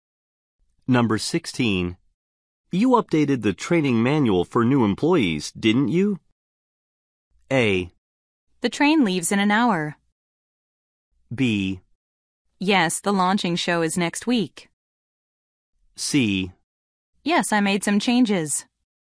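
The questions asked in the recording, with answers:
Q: You updated the training manual for new employees, didn't you?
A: C: Yes, I made some changes.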